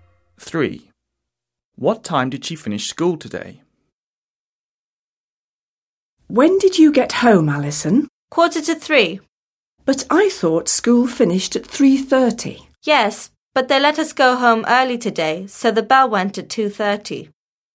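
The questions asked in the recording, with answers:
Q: What time did she finish school today?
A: 2:30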